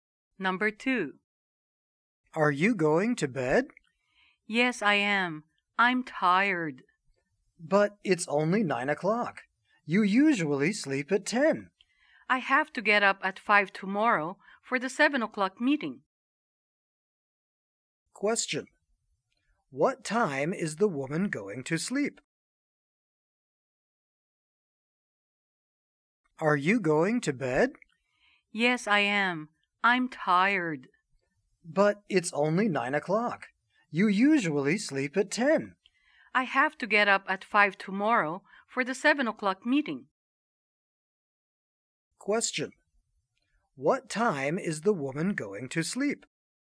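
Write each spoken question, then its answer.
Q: What time is the woman going to sleep?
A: At 9 o'clock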